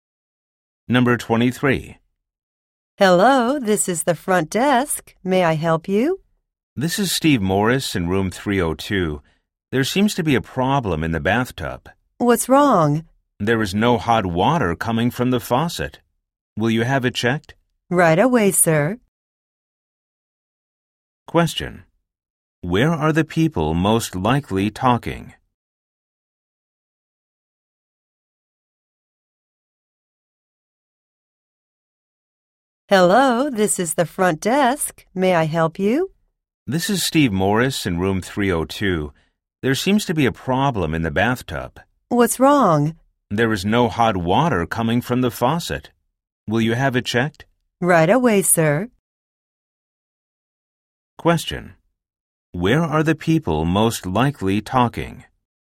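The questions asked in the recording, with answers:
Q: Where are the people most likely talking?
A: In a hotel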